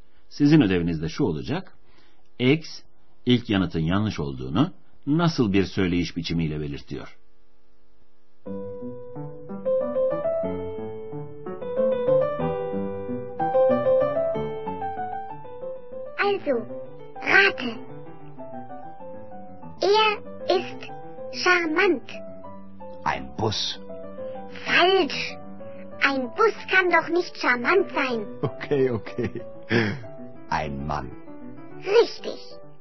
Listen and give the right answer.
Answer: Bir otobüs cazip olamaz ki.